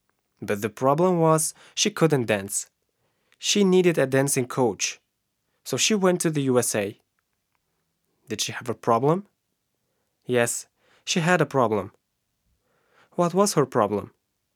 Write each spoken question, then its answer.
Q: What was her problem?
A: Her problem was she couldn't dance.